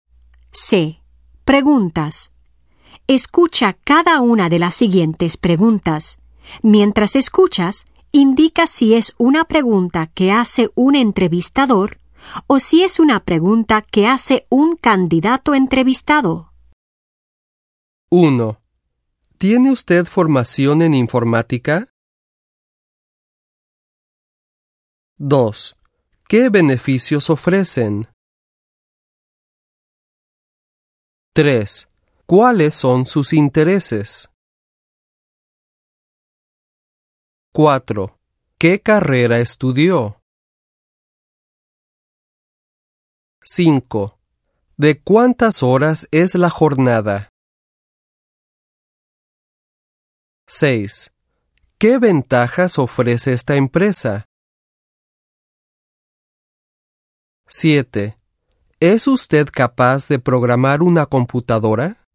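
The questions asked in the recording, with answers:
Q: ¿Tiene usted formación en informática?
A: entrevistador

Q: ¿Qué beneficios ofrecen?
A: candidato

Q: ¿Cuáles son sus intereses?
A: entrevistador

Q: ¿Qué carrera estudió?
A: entrevistador

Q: ¿De cuántas horas es la jornada?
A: candidato

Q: ¿Qué ventajas ofrece esta empresa?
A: candidato

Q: ¿Es usted capaz de programar una computadora?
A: entrevistador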